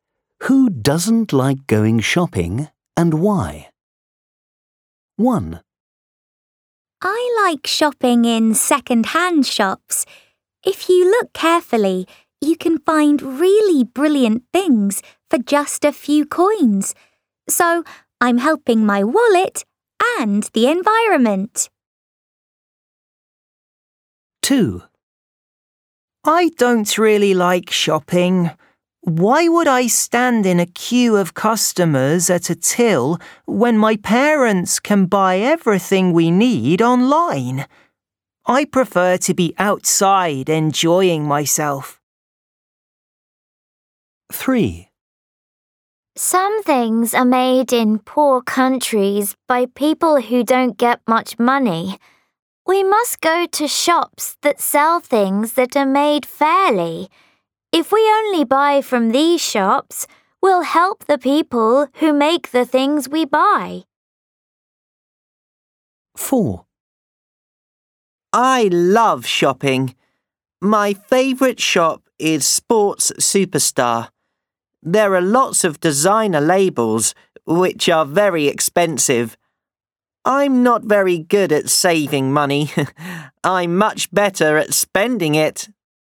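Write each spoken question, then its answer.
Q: Who doesn't like going shopping and why?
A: Speaker 2: they would rather be outside enjoying themselves than queue at a till, because their parents can buy everything online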